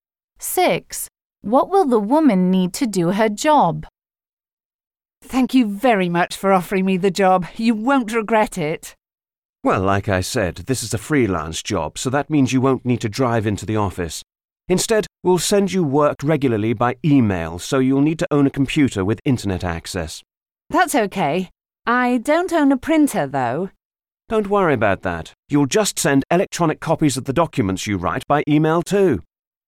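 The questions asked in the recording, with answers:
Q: What will the woman need to do her job?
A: A computer with internet access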